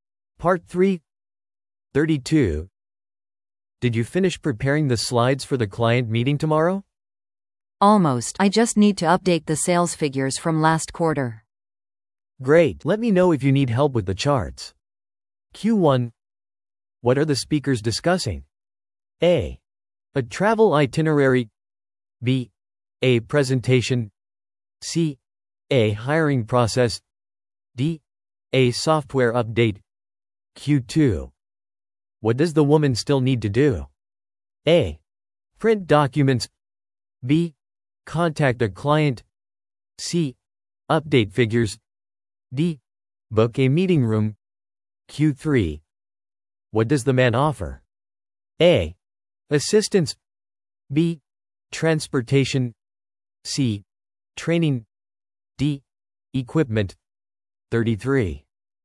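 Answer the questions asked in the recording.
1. B: A presentation.
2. C: Update figures.
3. A: Assistance.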